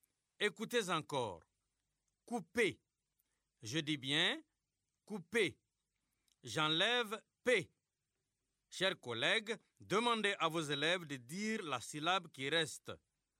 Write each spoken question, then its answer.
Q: J'enlève p. Chers collègues, demandez à vos élèves de dire la syllabe qui reste.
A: Il reste cou.